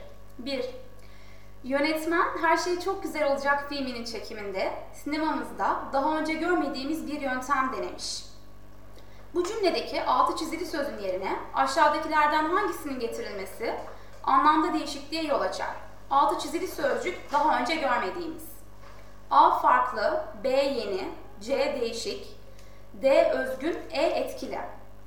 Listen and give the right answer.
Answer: Doğru yanıt E.